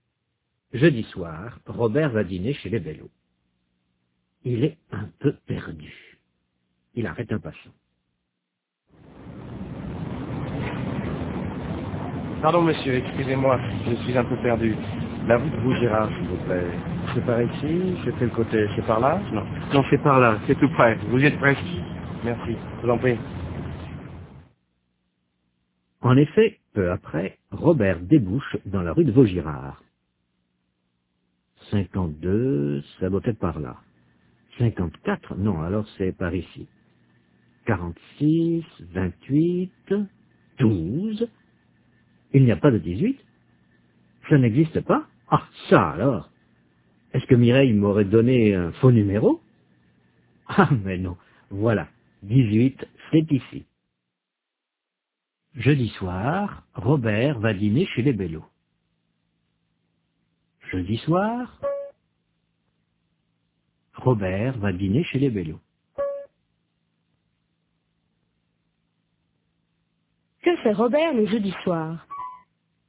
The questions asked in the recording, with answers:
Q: Que fait Robert le jeudi soir?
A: Il va dîner chez les Bellot.